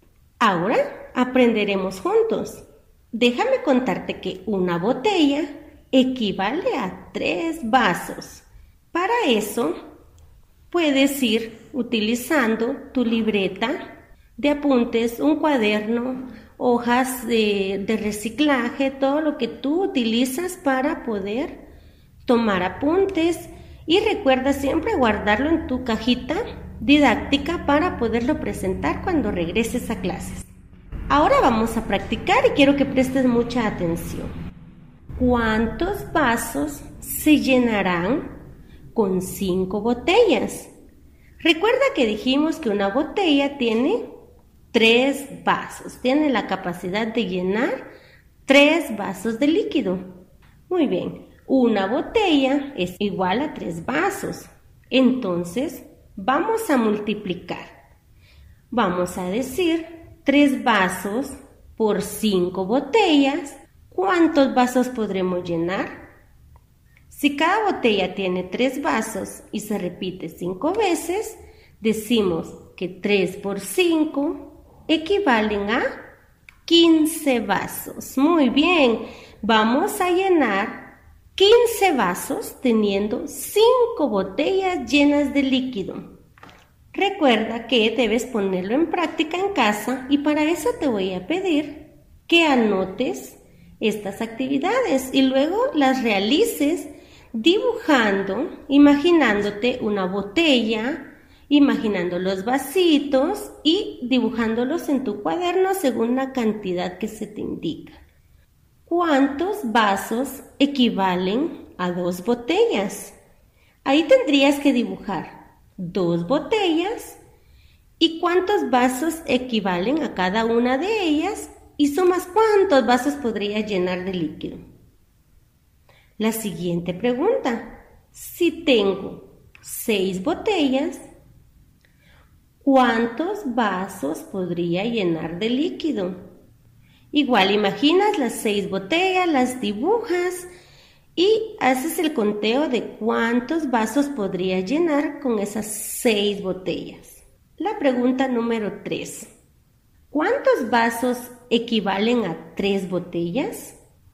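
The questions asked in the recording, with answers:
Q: ¿Cuántos vasos equivalen a 2 botellas?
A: 6 vasos

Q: si tengo 6 botellas, ¿cuántos vasos podría llenar de líquido?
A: 18 vasos

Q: ¿Cuántos vasos equivalen a 3 botellas?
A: 9 vasos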